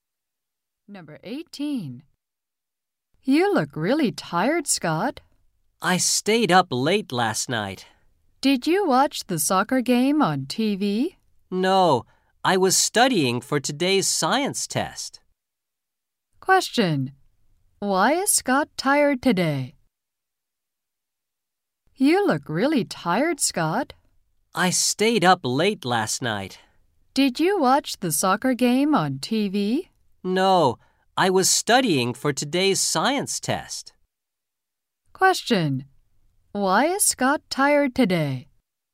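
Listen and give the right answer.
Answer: He stayed up late studying for a science test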